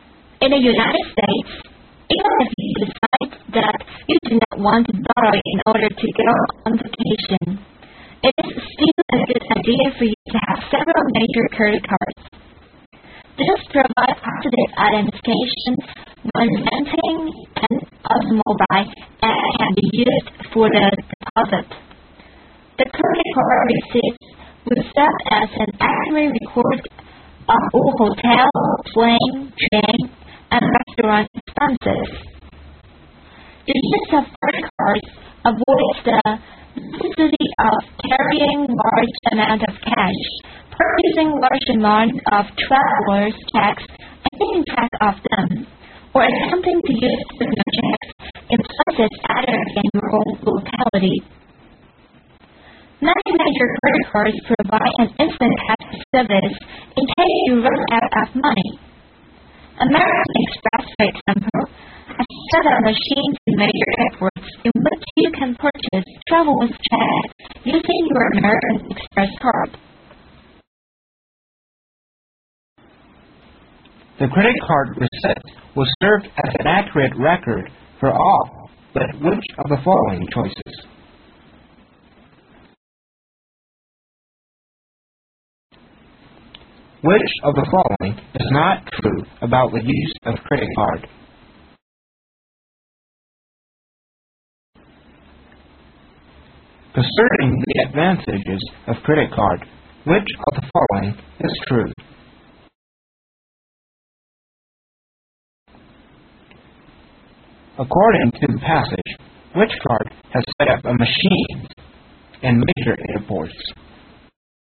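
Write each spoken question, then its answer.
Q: According to the passage, which card has set up a machine in major airports?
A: American Express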